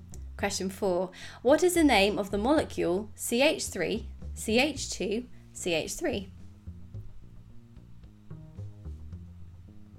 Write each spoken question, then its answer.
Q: What is the name of the molecule CH3, CH2, CH3?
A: It's propane.